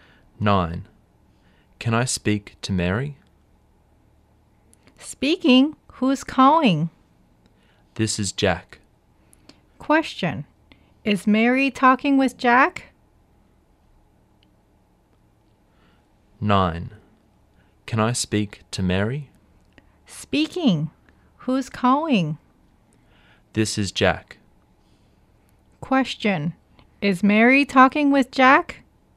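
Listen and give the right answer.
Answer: Yes, she is.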